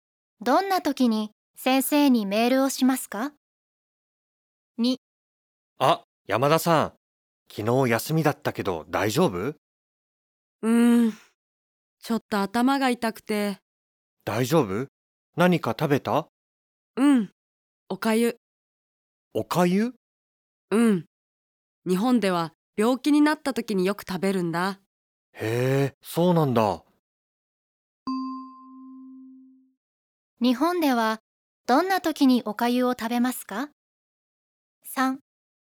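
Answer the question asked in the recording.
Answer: 病気になった時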